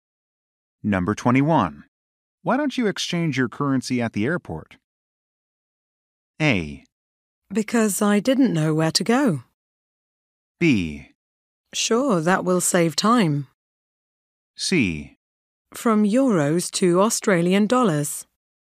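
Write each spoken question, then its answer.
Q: Why don't you exchange your currency at the airport?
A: B: Sure, that will save time.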